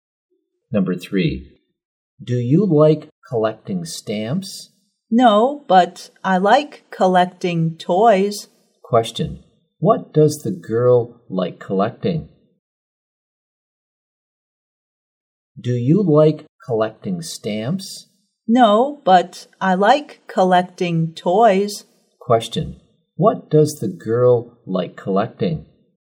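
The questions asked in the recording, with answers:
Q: Question, what does the girl like collecting?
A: Toys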